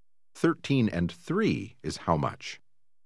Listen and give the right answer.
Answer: 16.